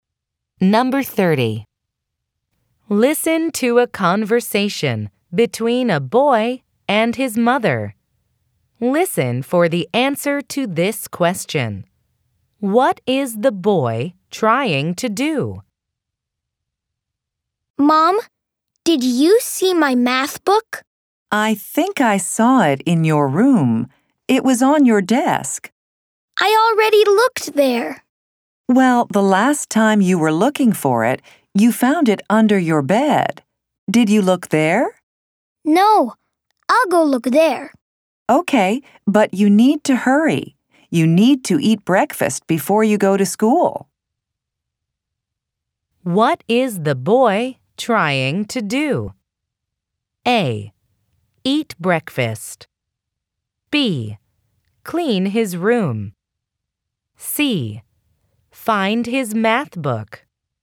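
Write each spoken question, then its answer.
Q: What is the boy trying to do?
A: C: Find his math book.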